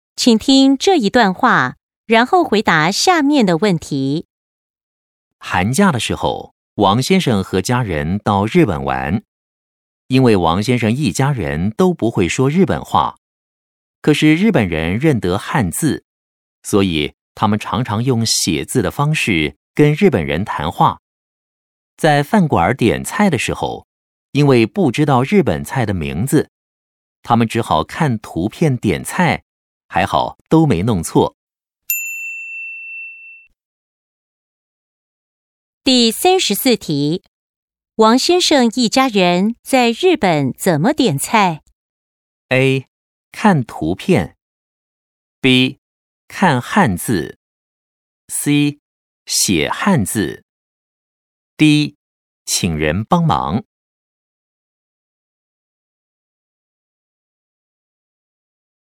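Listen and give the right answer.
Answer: A: 看图片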